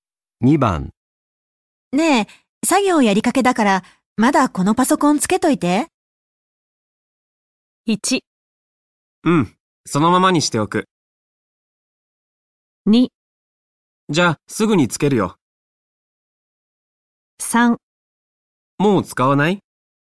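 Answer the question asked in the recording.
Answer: 1: うん、そのままにしておく。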